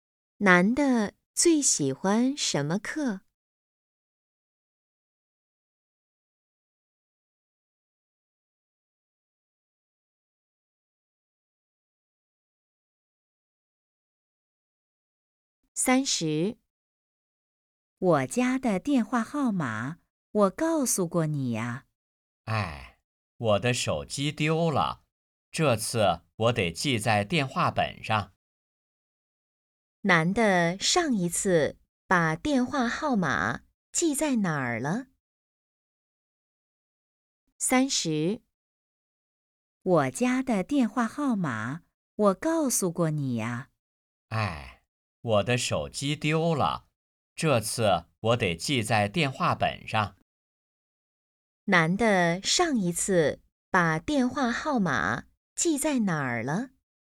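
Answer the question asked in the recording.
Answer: 手机上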